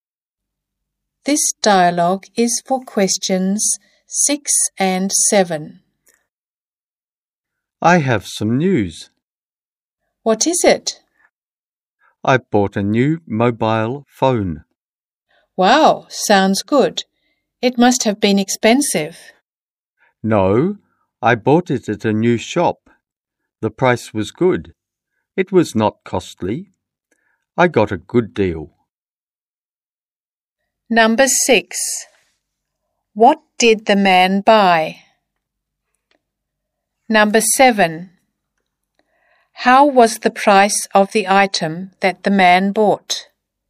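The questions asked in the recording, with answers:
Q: What did the man buy?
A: A new mobile phone

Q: How was the price of the item that the man bought?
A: Good, not expensive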